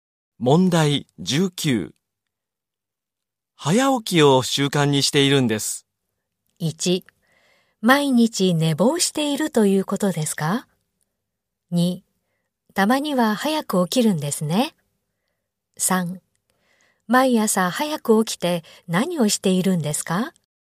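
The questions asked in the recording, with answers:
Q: 早起きを習慣にしているんです。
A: 3: 毎朝早く起きて何をしているんですか?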